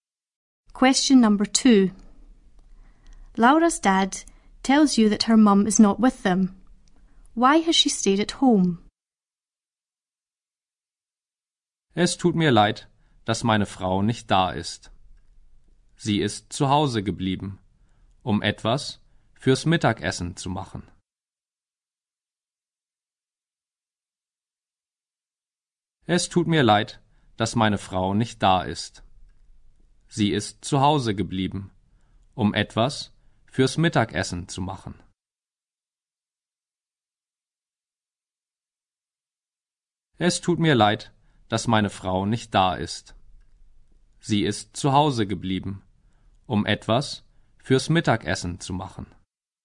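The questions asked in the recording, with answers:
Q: Why has she stayed at home?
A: To make something for lunch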